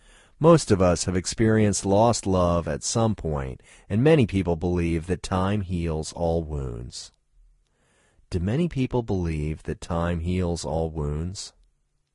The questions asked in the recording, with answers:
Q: Do many people believe that time heals all wounds?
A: Yes, many people believe that time heals all wounds.